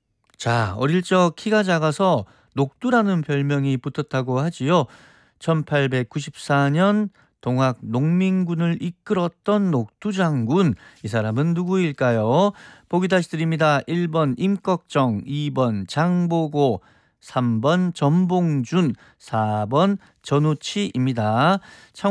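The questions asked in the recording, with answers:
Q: 1894년 동학 농민군을 이끌었던 녹두 장군, 이 사람은 누구일까요?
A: 3: 전봉준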